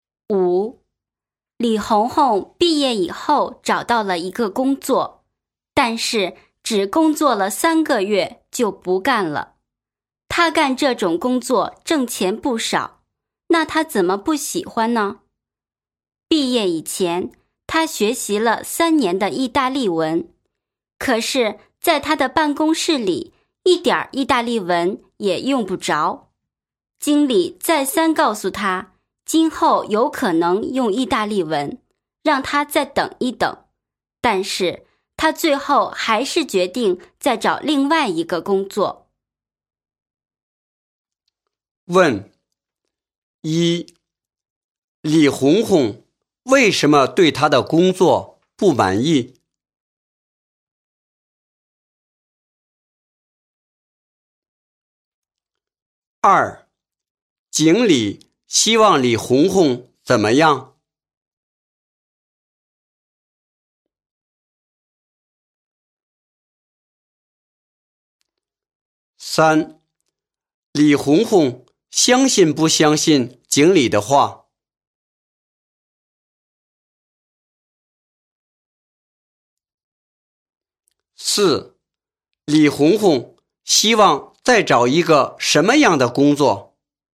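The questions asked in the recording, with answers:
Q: 李红红为什么对他的工作不满意?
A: 因为在办公室里一点意大利文也用不着

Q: 经理希望李红红怎么样?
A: 再等一等,今后有可能用意大利文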